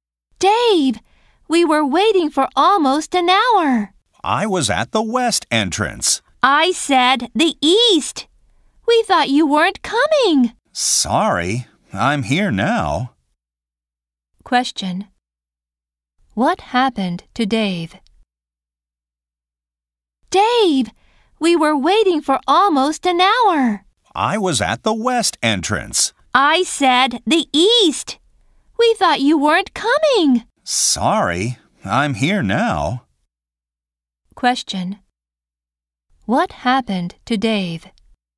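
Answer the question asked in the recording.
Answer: He went to the wrong entrance (west instead of east).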